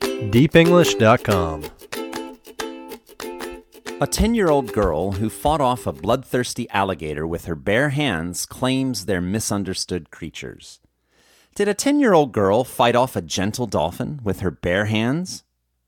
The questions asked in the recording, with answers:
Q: Did a 10-year-old girl fight off a gentle dolphin with her bare hands?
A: No, a 10-year-old girl didn't fight off a gentle dolphin with her bare hands.